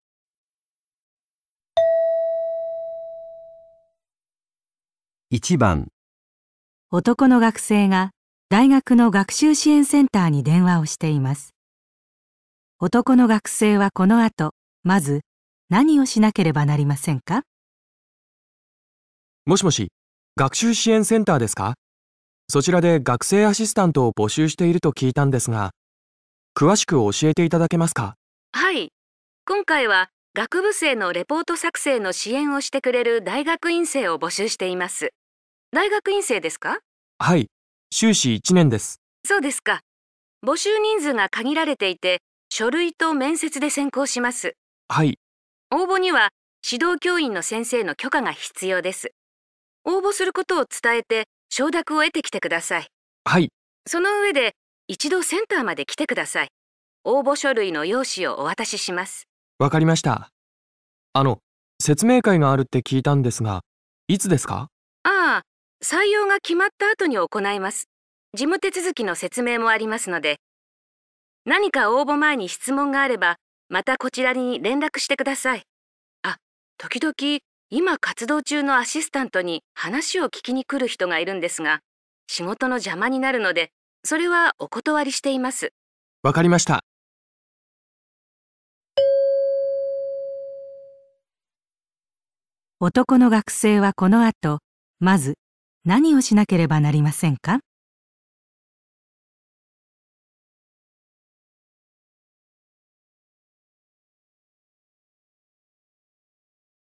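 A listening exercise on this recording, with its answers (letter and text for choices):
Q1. 男の学生はこの後、まず何をしなければなりませんか?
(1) 応募書類の用紙を取りに行く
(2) 指導教員の許可を得る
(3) 説明会に参加する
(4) 経験者に話を聞く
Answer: (2) 指導教員の許可を得る

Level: 【N1 第1回】聴解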